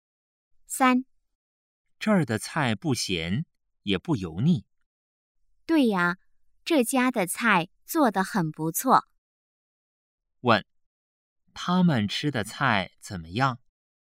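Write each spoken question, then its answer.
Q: 问,他们吃的菜怎么样?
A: 不咸,也不油腻,很不错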